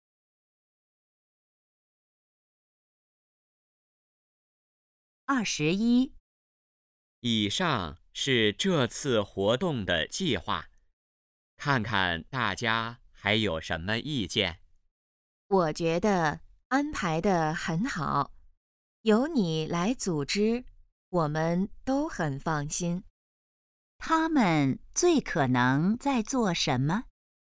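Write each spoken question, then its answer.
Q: 他们最可能在做什么?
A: 讨论活动计划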